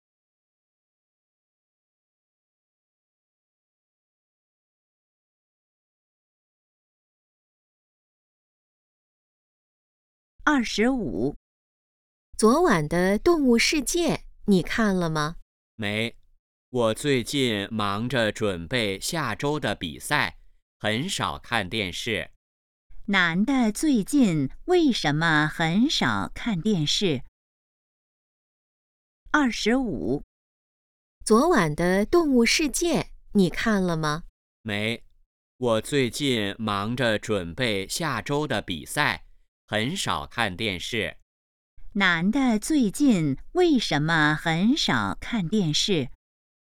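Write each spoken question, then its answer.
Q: 男的最近为什么很少看电视?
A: 忙着准备比赛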